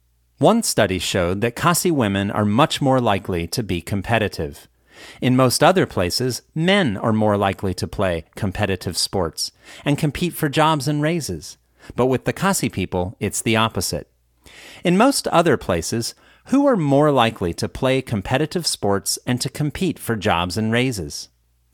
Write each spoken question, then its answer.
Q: In most other places, who are more likely to play competitive sports and to compete for jobs and raises?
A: In most other places, men are more likely to play competitive sports and compete for jobs and raises.